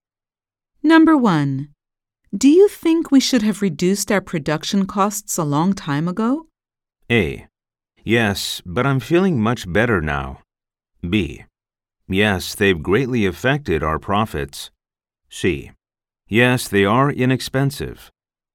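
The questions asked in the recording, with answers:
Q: Do you think we should have reduced our production costs a long time ago?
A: B: Yes, they've greatly affected our profits.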